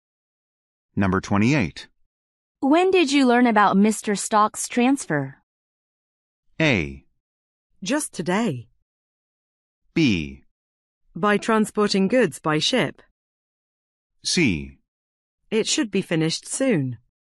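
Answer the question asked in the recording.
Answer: A: Just today.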